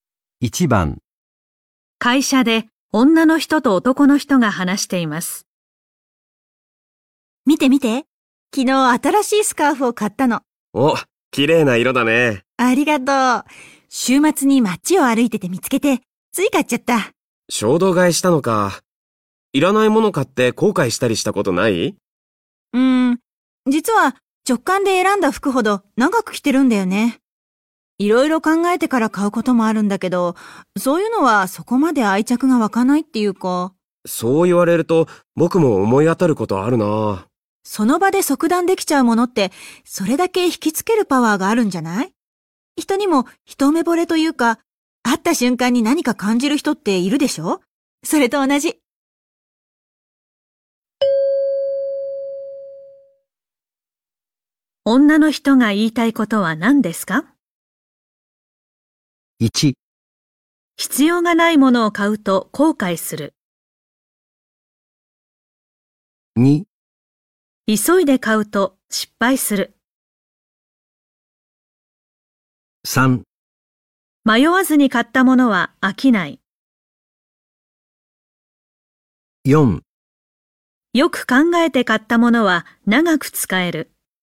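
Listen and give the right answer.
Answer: 3: 迷わずに買ったものは飽きない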